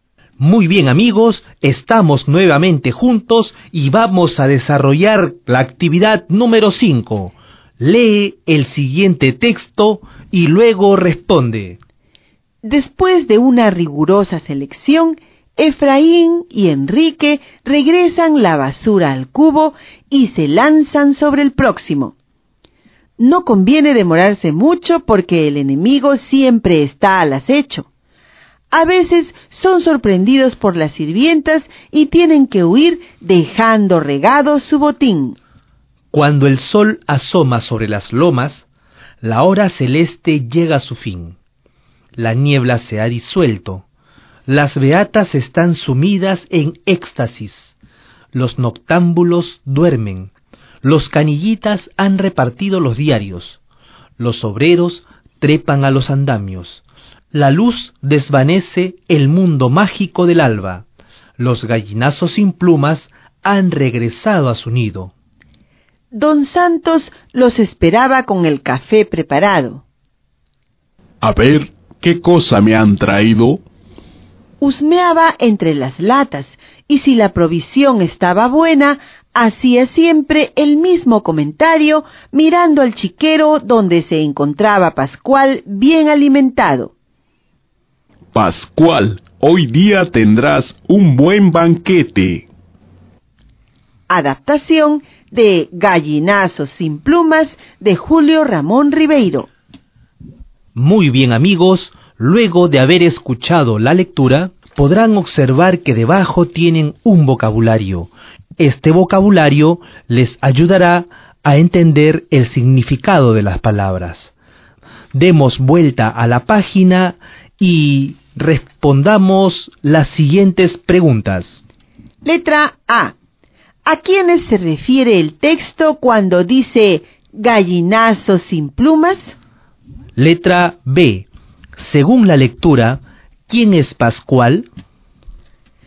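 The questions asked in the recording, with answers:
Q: ¿A quiénes se refiere el texto cuando dice gallinazos sin plumas?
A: A Efraín y Enrique

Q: Según la lectura, ¿quién es Pascual?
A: El cerdo de Don Santos, que vive en el chiquero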